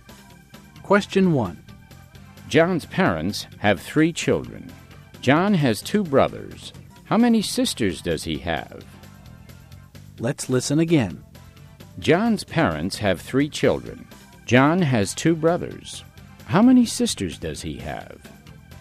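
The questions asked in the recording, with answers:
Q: How many sisters does he have?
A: None (zero)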